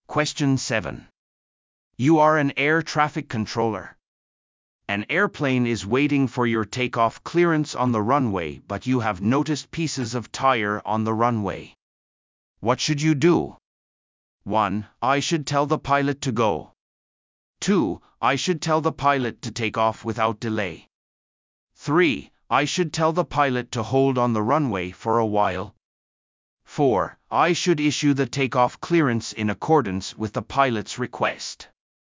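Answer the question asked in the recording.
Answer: 3: I should tell the pilot to hold on the runway for a while.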